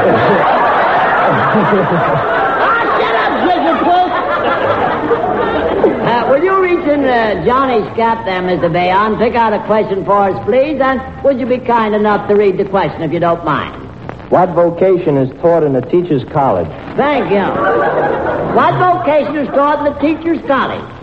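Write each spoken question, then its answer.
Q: What vocation is taught in the teacher's college?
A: Teaching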